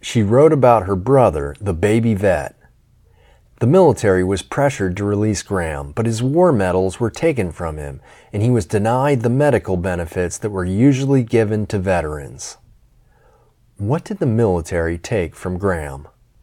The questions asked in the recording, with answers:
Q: What did the military take from Graham?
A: The military took his war medals.